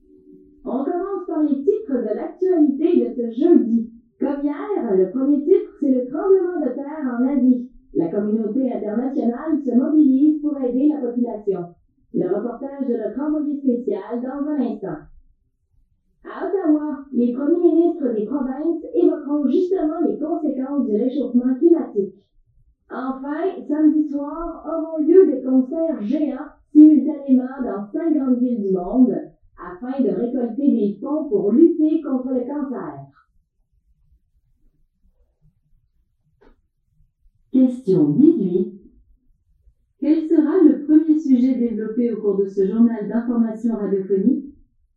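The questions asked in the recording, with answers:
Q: Quel sera le premier sujet développé au cours de ce journal d'information radiophonique?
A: Le tremblement de terre en Asie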